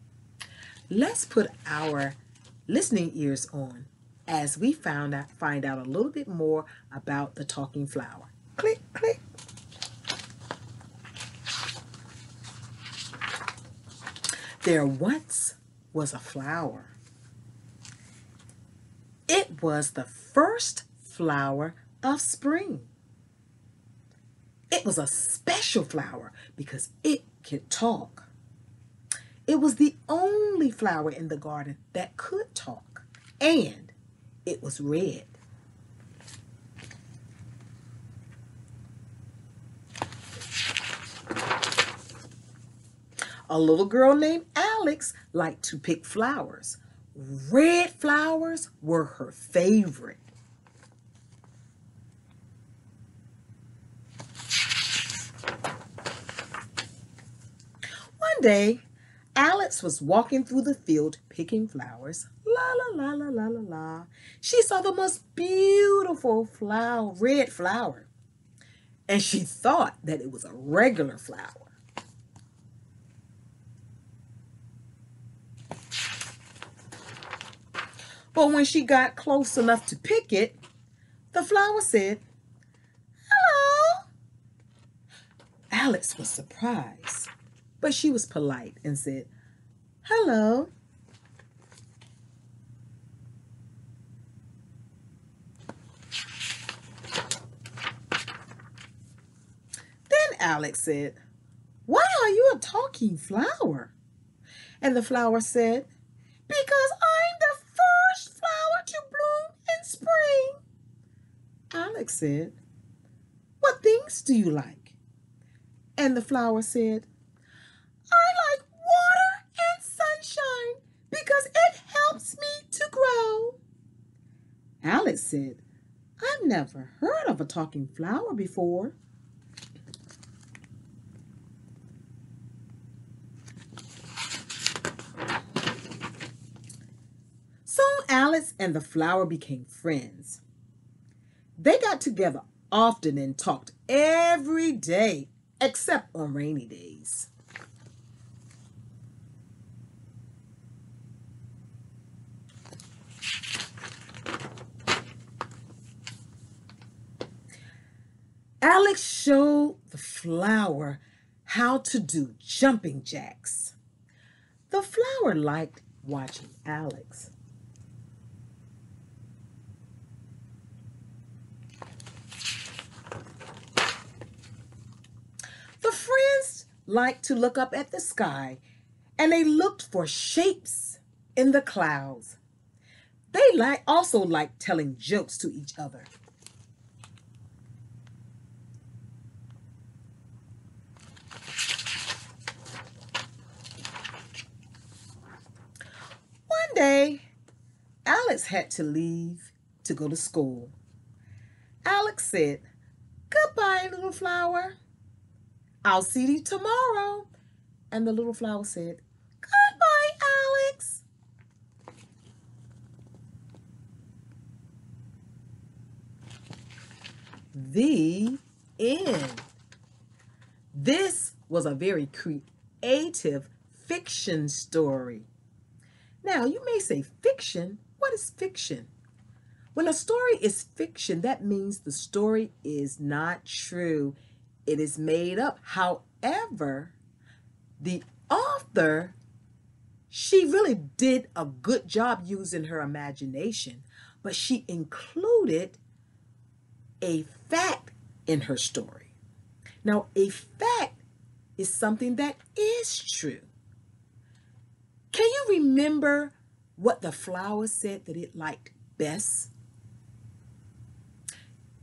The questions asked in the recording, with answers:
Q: Can you remember what the flower said that it liked best?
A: Yes, flowers, the flower liked water and sunshine.